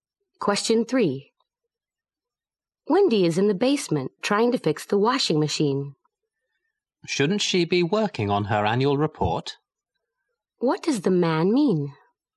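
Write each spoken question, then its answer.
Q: What does the man mean?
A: Wendy should be working on her annual report instead.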